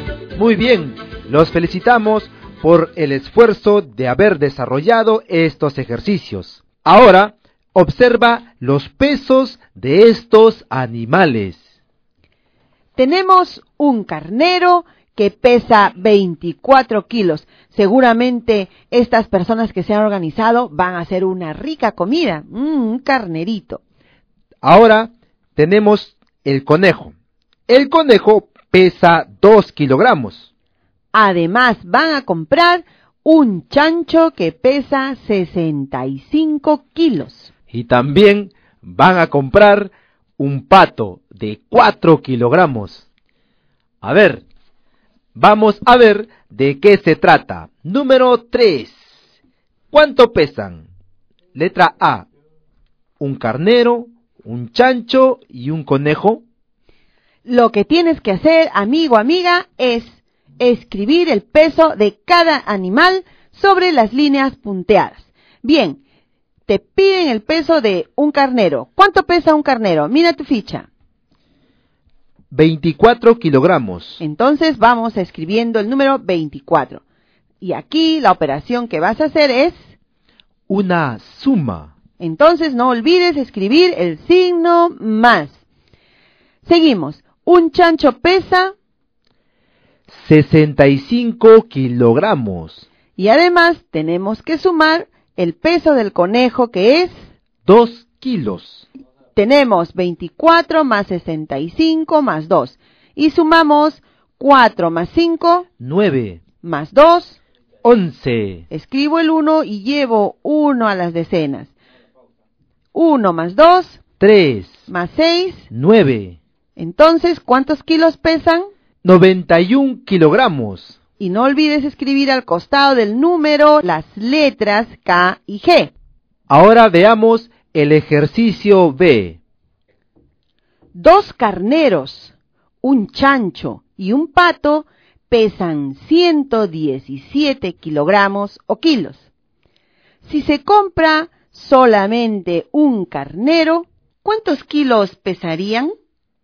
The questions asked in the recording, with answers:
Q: Dos carneros, un chancho y un pato pesan 117 kilogramos o kilos. Si se compra solamente un carnero, ¿cuántos kilos pesarían?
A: 93 kilogramos.